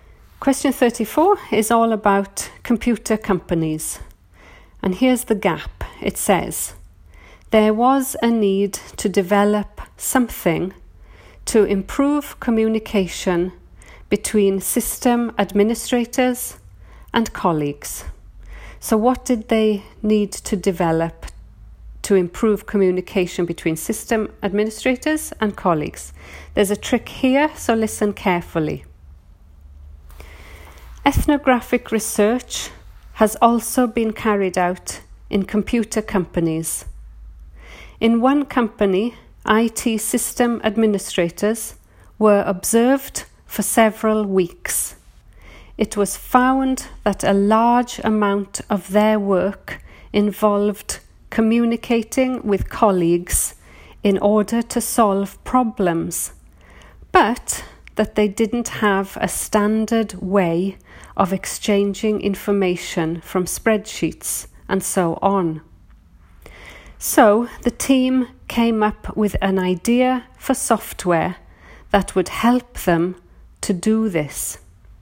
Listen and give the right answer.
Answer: So the answer there is software.